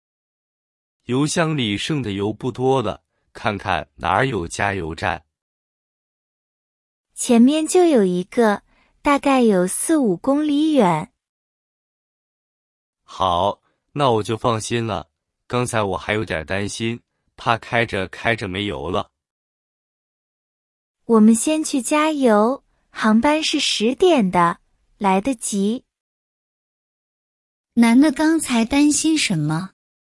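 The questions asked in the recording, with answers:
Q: 男的刚才担心什么?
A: 担心开着开着车没油了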